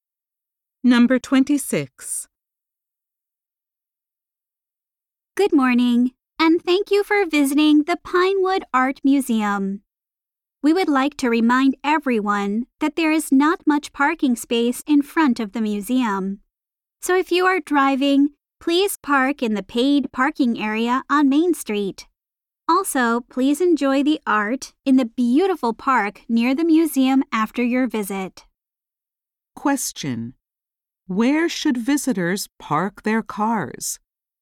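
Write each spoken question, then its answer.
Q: Where should visitors park their cars?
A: In the paid parking area on Main Street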